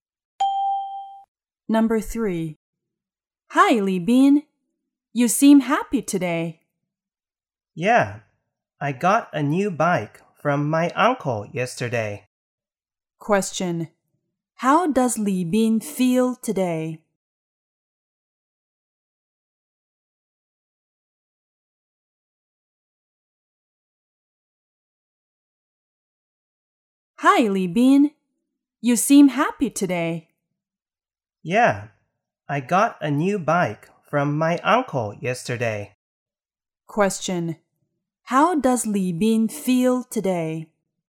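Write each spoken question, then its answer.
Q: How does Li Bin feel today?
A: Happy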